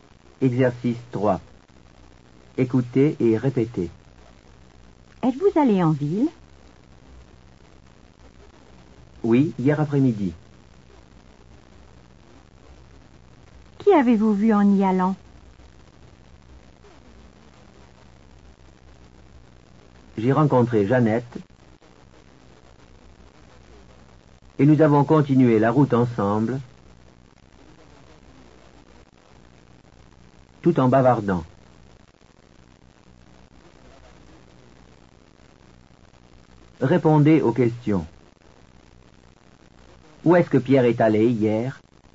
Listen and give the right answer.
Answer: Il est allé en ville.